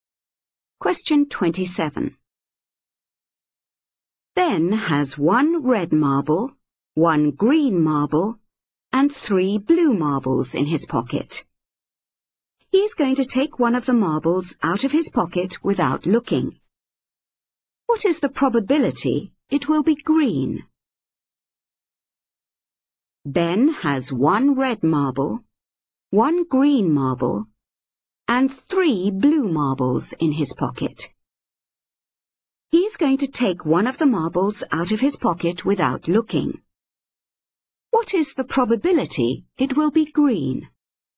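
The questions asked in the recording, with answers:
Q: What is the probability it will be green?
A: 1/5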